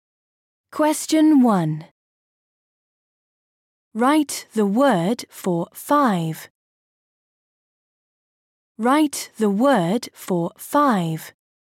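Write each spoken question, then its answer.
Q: Write the word for 5.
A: five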